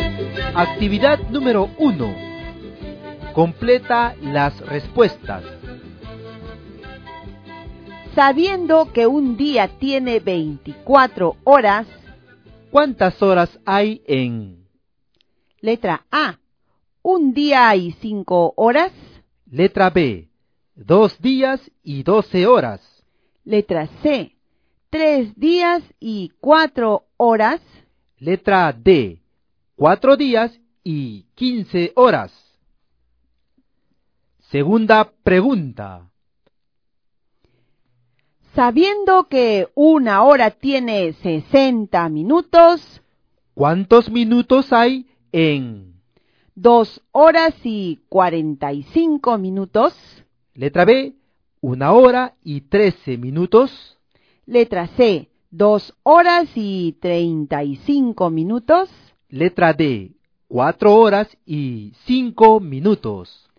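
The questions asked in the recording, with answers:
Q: Letra B. 2 días y 12 horas.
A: 60 horas

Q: Letra C. 3 días y 4 horas.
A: 76 horas

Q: Letra D. 4 días y 15 horas.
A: 111 horas

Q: Sabiendo que una hora tiene 60 minutos, ¿cuántos minutos hay en? 2 horas y 45 minutos.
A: 165 minutos

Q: Letra B, 1 hora y 13 minutos.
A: 73 minutos

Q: Letra C, 2 horas y 35 minutos.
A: 155 minutos

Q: Letra D, 4 horas y 5 minutos.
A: 245 minutos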